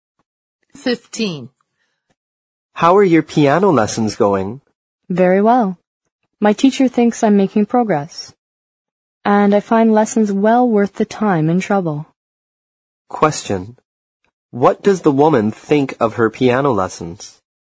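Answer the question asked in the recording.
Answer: They are well worth the time and trouble.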